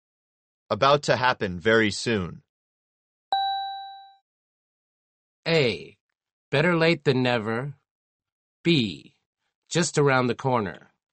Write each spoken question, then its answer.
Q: About to happen very soon.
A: The answer is B. Just around the corner.